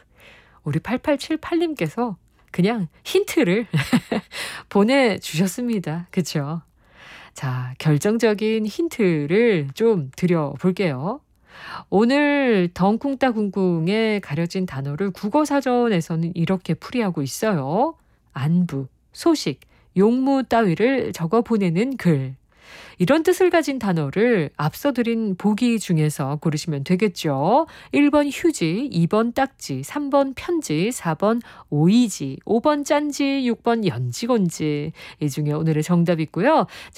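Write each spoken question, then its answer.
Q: 안부, 소식, 용무 따위를 적어 보내는 글. 이런 뜻을 가진 단어를 앞서 드린 보기 중에서 고르시면 되겠죠.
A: 3: 편지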